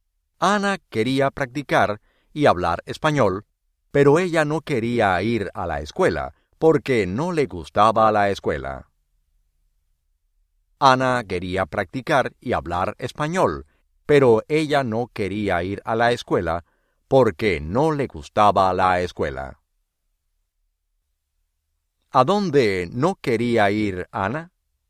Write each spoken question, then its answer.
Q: ¿A dónde no quería ir Ana?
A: A la escuela.